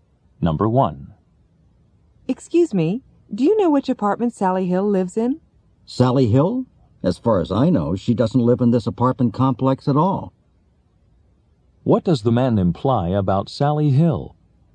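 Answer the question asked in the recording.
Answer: She doesn't live in this apartment complex.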